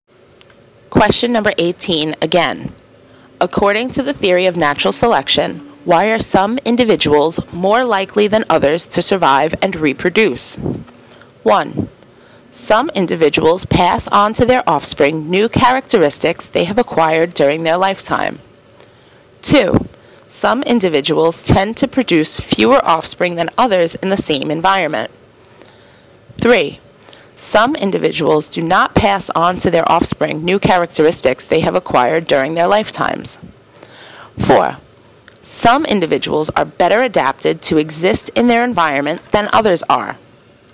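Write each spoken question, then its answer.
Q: According to the theory of natural selection, why are some individuals more likely than others to survive and reproduce?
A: 4: Some individuals are better adapted to exist in their environment than others are.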